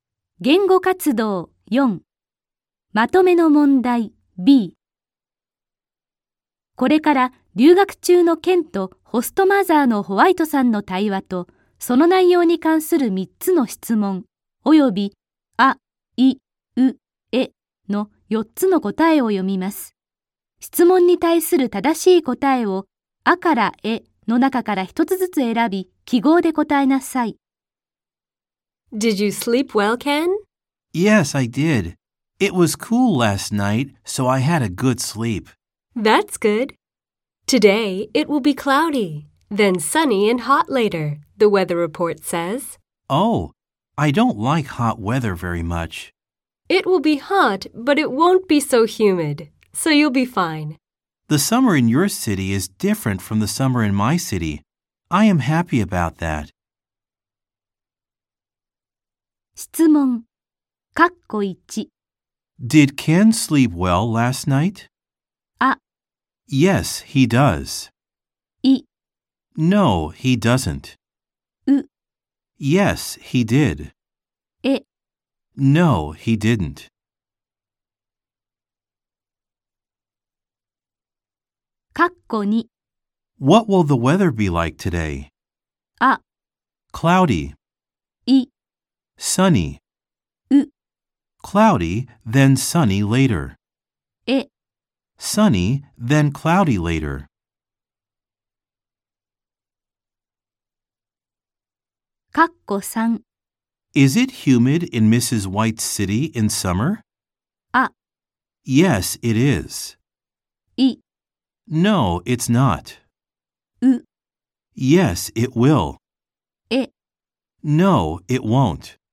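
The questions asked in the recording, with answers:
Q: Did Ken sleep well last night?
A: う: Yes, he did.

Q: What will the weather be like today?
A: う: Cloudy, then sunny later.

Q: Is it humid in Mrs. White's city in summer?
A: い: No, it's not.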